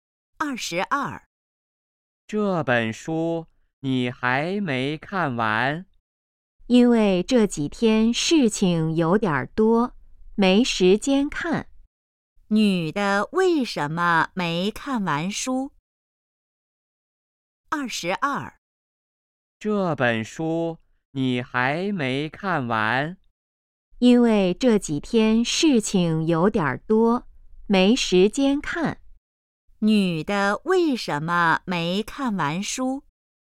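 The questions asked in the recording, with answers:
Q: 女的为什么没看完书?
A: 这几天事情多,没时间看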